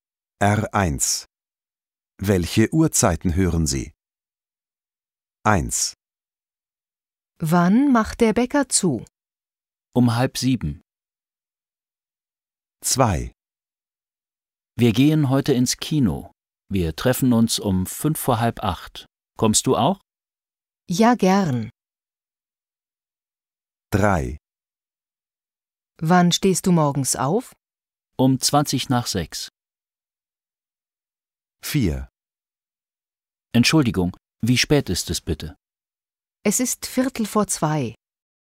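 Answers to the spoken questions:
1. 6:30
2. 7:55
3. 6:20
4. 2:15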